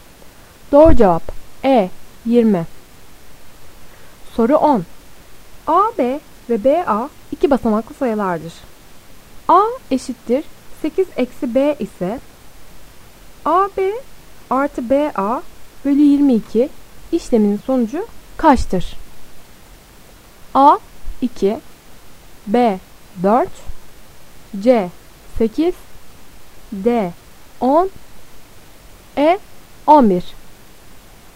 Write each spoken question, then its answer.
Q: A eşittir 8 eksi B ise A, B artı B, A bölü 22 işleminin sonucu kaçtır?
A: Doğru cevap B 4.